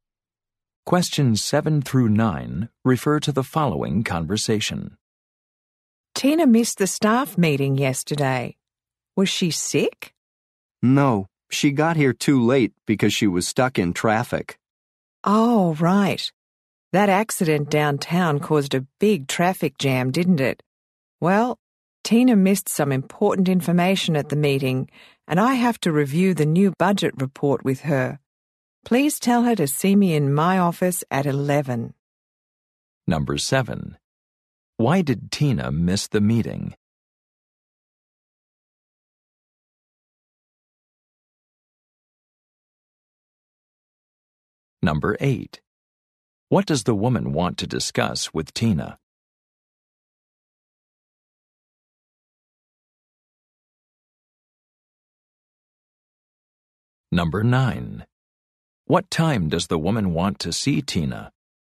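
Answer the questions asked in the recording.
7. She was stuck in traffic
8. The new budget report
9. At 11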